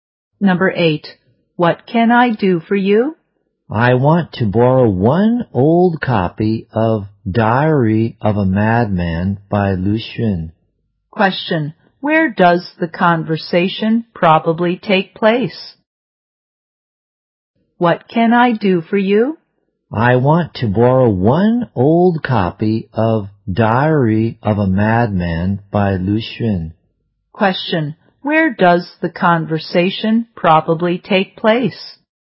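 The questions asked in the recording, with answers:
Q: where does the conversation probably take place?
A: In a library.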